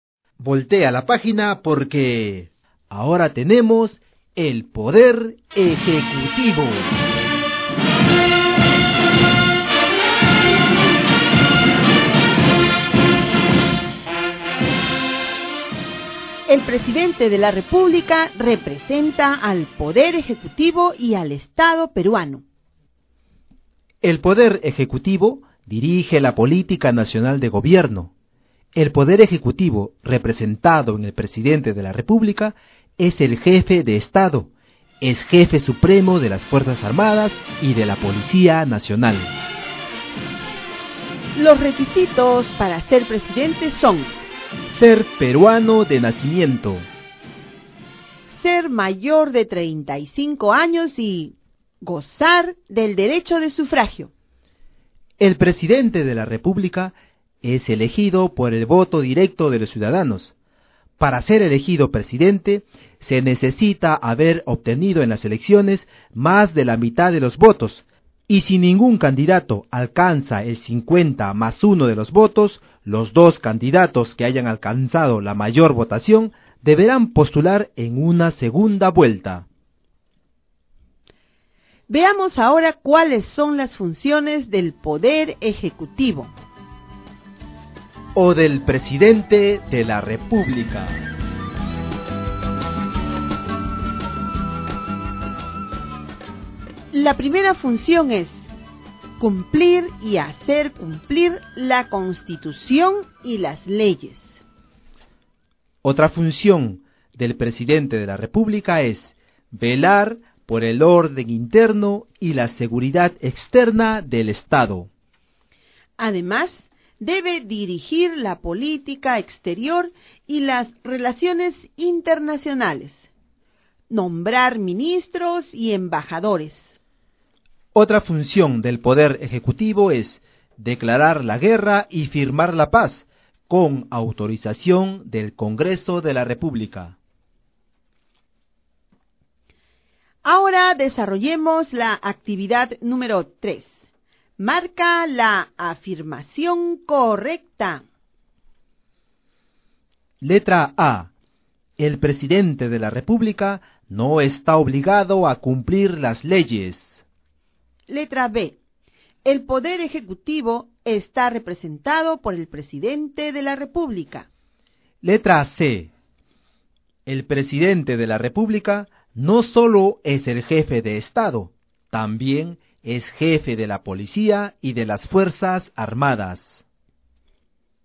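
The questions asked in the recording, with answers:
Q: Letra A. El presidente de la República no está obligado a cumplir las leyes.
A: Incorrecta

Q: Letra B. El Poder Ejecutivo está representado por el presidente de la República.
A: Correcta

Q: Letra C. El presidente de la República no solo es el jefe de Estado, también es jefe de la policía y de las Fuerzas Armadas.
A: Correcta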